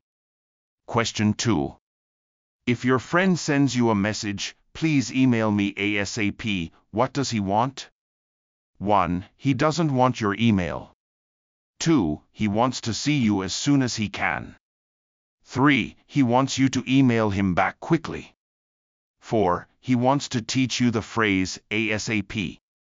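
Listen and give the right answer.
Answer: 3: He wants you to email him back quickly.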